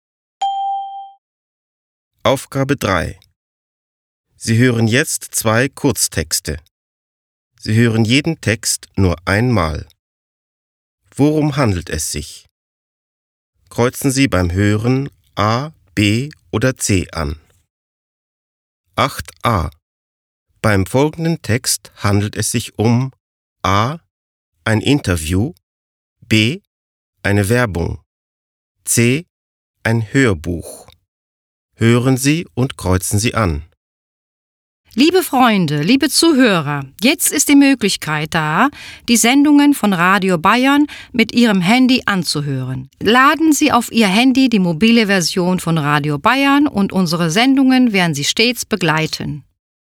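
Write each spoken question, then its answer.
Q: Beim folgenden Text handelt es sich um A. ein Interview, B. eine Werbung, C. ein Hörbuch.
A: B: eine Werbung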